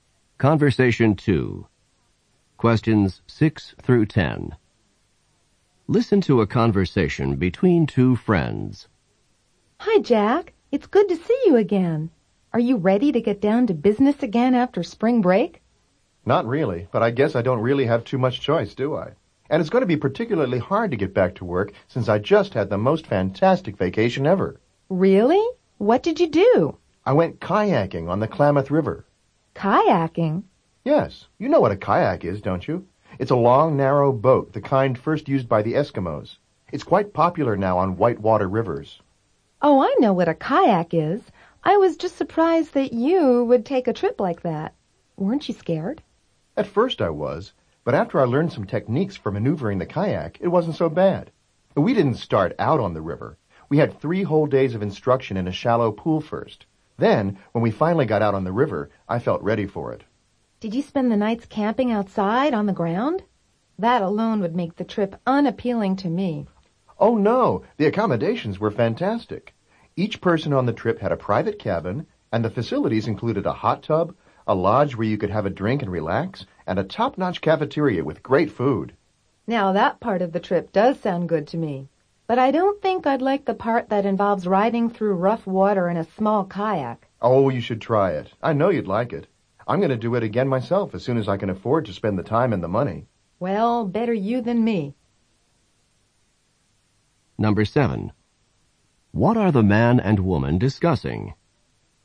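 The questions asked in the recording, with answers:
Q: What are the man and woman discussing?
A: The kayaking trip the man took over spring break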